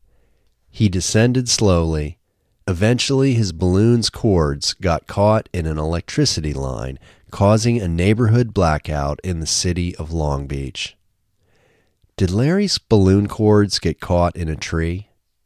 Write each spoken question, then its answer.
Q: Did Larry's balloon cords get caught in a tree?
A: No, they didn't get caught in a tree.